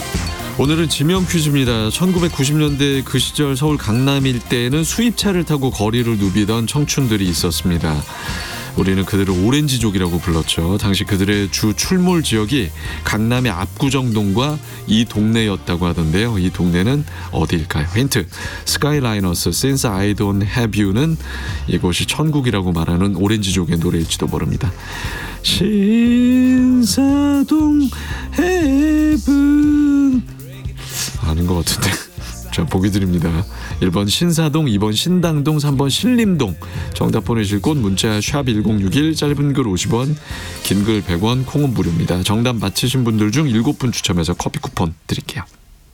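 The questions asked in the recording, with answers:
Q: 이 동네는 어디일까요?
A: 1번: 신사동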